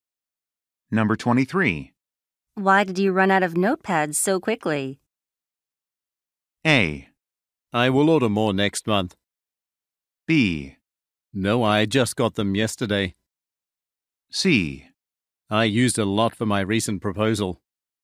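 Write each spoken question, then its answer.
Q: Why did you run out of notepads so quickly?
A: C: I used a lot for my recent proposal.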